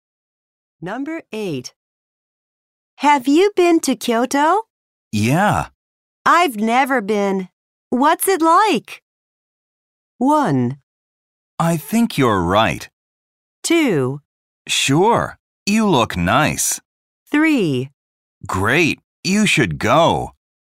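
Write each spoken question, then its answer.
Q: I've never been. What's it like?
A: 3: Great. You should go.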